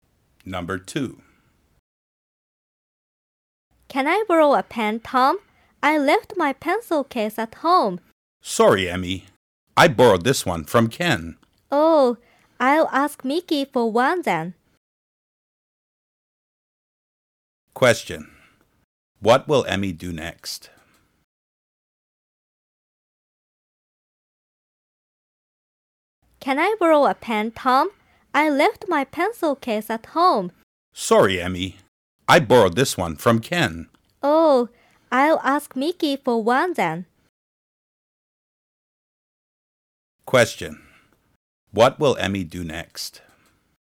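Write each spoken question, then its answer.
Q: What will Emmy do next?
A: Ask Mickey for a pen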